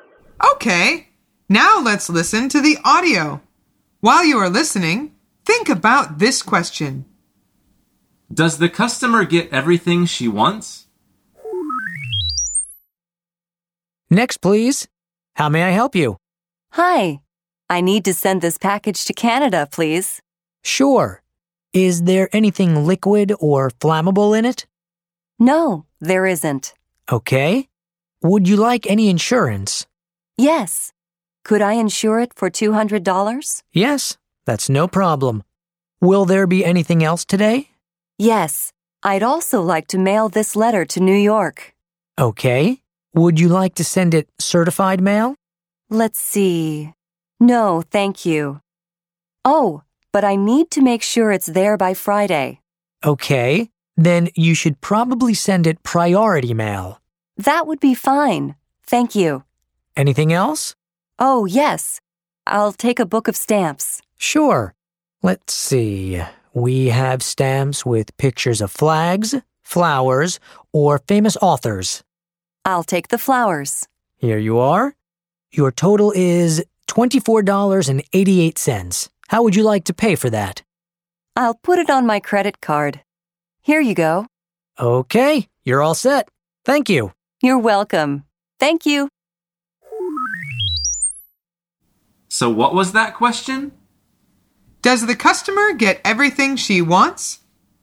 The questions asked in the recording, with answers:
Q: Does the customer get everything she wants?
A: The answer is yes, she does.